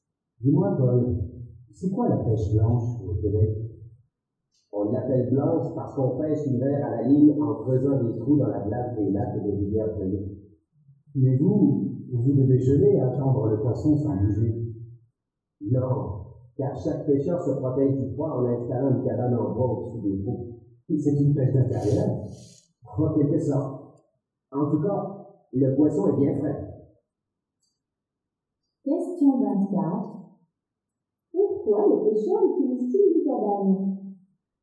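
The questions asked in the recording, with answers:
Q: Pourquoi les pêcheurs utilisent-ils des cabanes?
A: Pour se protéger du froid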